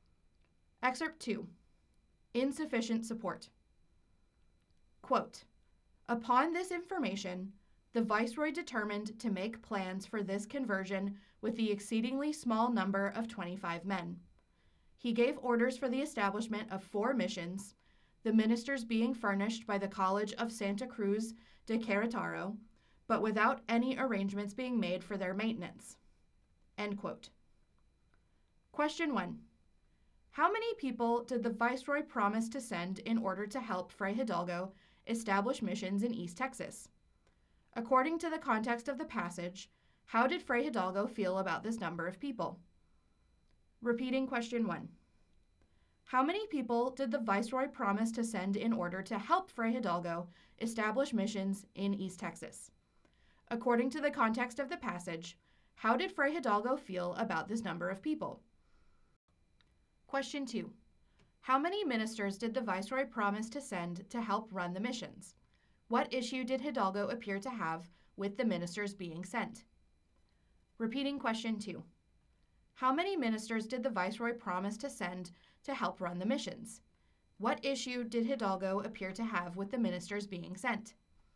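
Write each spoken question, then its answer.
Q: How many people did the viceroy promise to send in order to help Fray Hidalgo establish missions in East Texas?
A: 25 men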